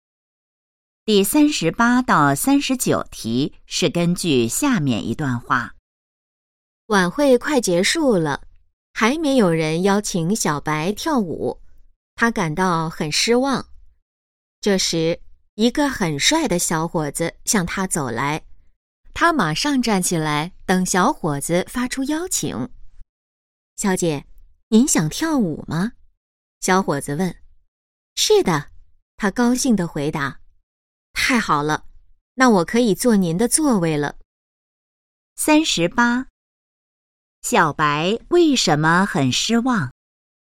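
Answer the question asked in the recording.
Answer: 晚会快结束了还没有人邀请她跳舞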